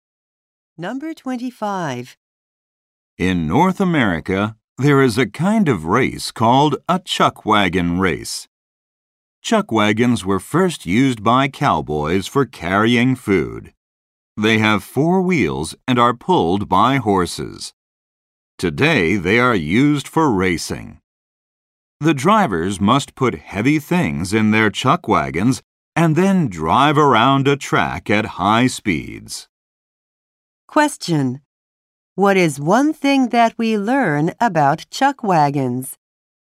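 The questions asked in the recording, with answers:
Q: What is one thing that we learn about chuck wagons?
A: Cowboys first used them to carry food.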